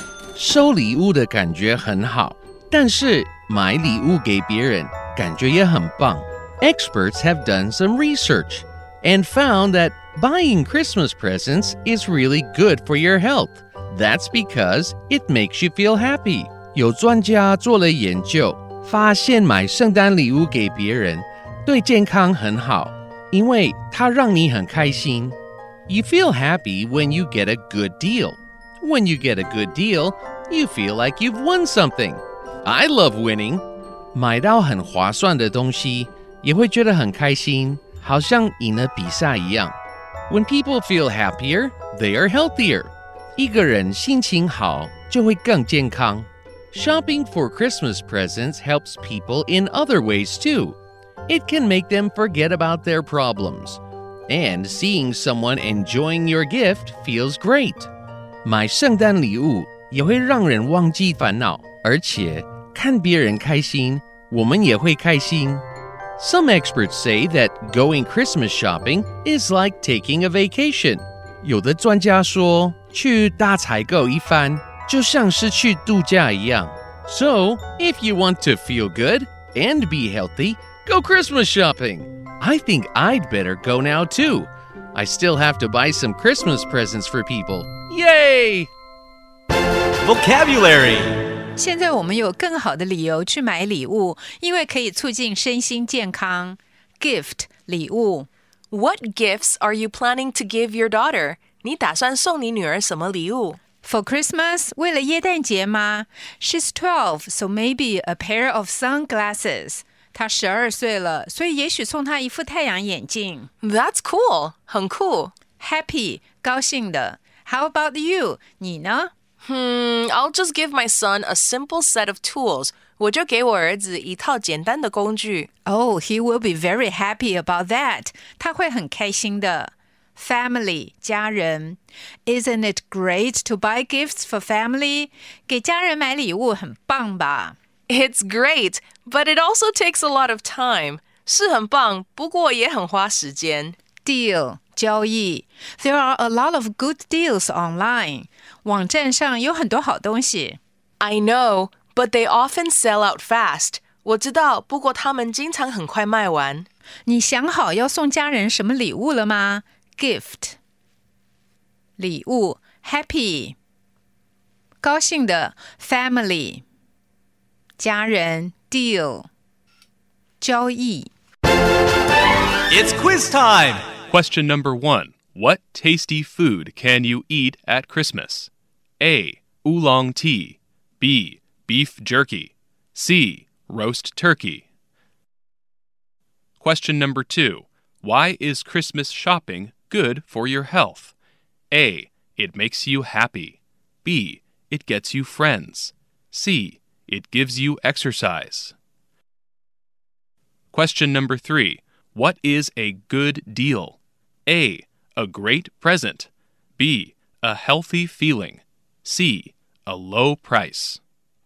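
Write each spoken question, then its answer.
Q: Why is Christmas shopping good for your health?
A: A: It makes you happy

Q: What is a good deal?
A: C: A low price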